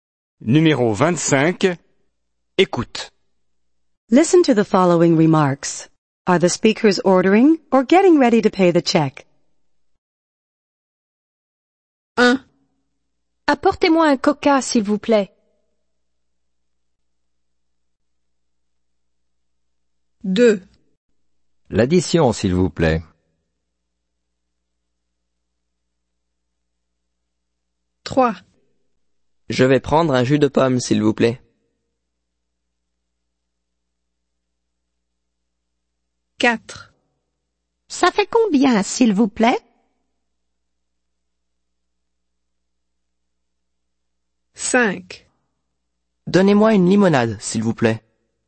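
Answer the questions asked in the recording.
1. ordering
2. getting ready to pay the check
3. ordering
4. getting ready to pay the check
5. ordering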